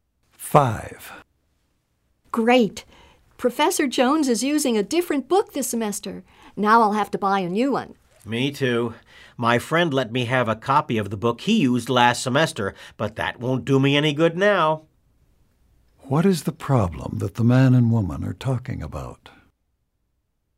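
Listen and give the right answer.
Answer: The professor changed textbooks, so they must buy a new book.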